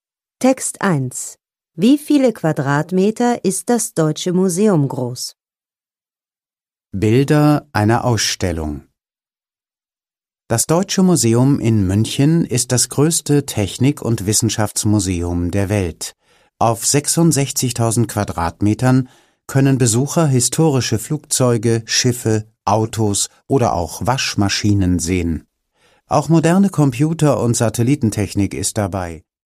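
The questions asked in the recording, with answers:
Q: Wie viele Quadratmeter ist das Deutsche Museum groß?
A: 66.000 Quadratmeter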